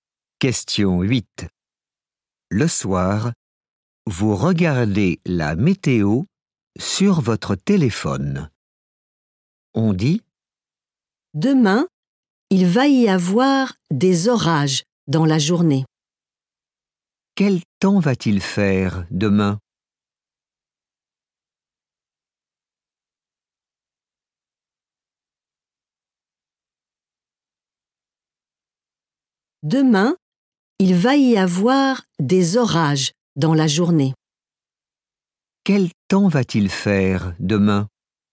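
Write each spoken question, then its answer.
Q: Quel temps va-t-il faire demain?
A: des orages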